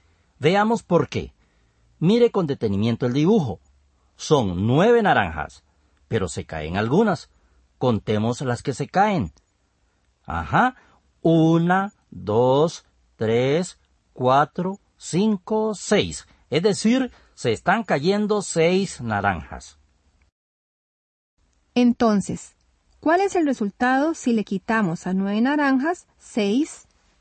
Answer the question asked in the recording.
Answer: El resultado es 3, ya que representa el número de naranjas que quedan sobre la mesa.